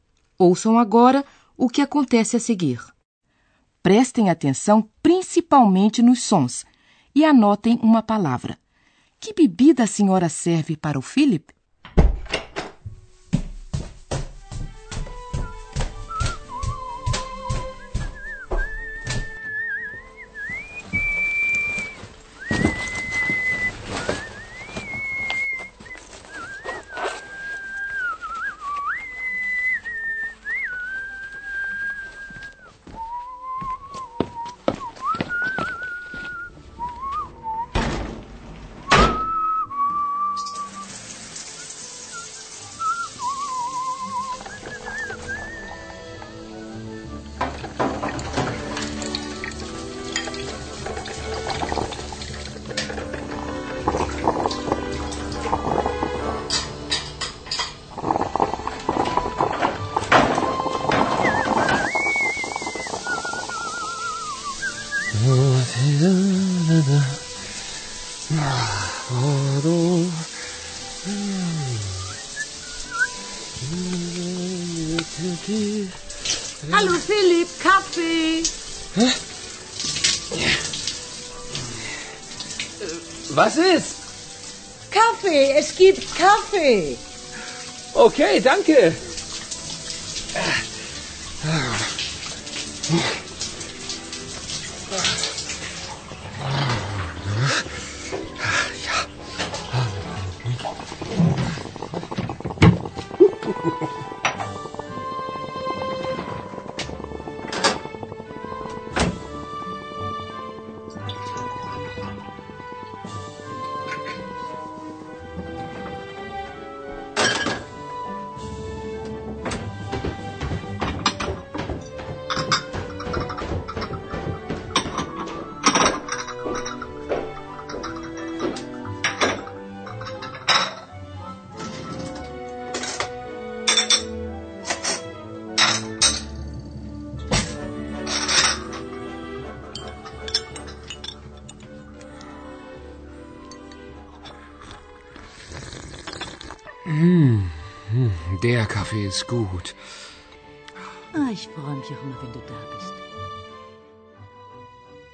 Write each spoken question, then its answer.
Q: Que bebida a senhora serve para o Philip?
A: serviu café para ele